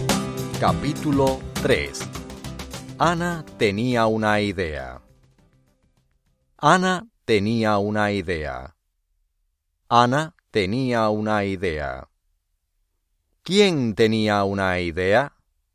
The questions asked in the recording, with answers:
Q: ¿Quién tenía una idea?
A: Ana.